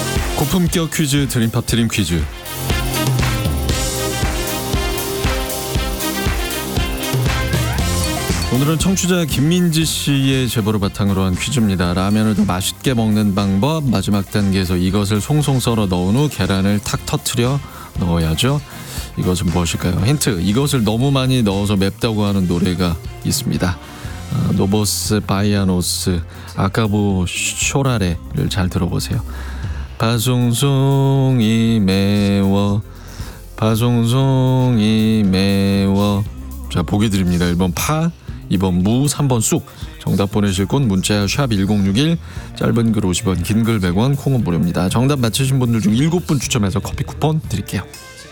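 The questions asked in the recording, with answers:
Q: 이것은 무엇일까요?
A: 1: 파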